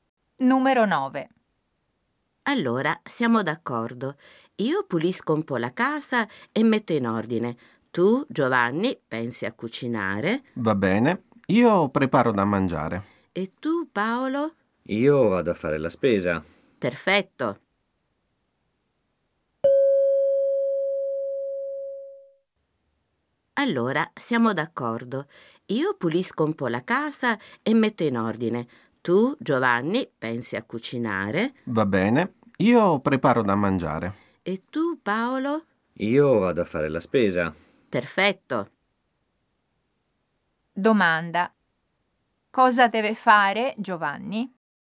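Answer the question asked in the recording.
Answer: Cucinare, preparare da mangiare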